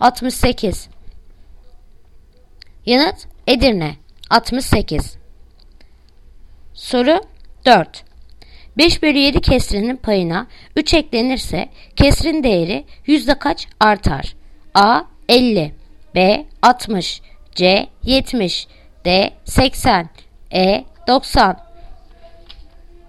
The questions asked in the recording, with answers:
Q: 5 bölü 7 kesrinin payına 3 eklenirse kesrin değeri yüzde kaç artar?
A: Yanıt Bursa 60